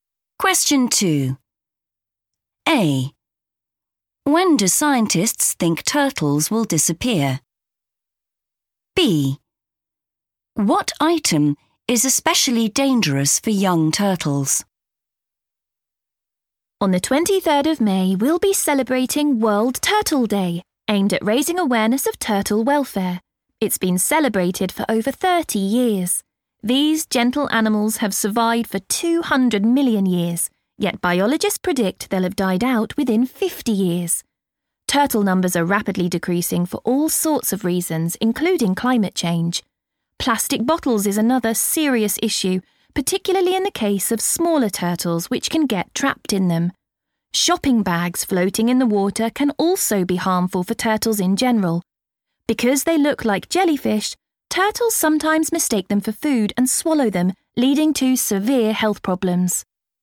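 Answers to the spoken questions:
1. within 50 years
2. plastic bottles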